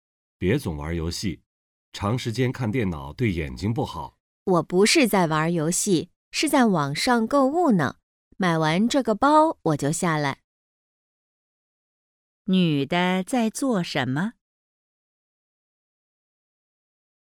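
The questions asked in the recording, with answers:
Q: 女的在做什么?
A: 在网上购物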